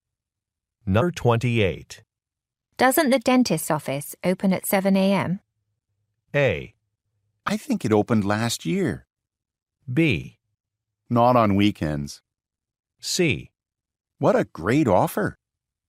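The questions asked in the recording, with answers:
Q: Doesn't the dentist's office open at 7 a.m.?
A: B: Not on weekends.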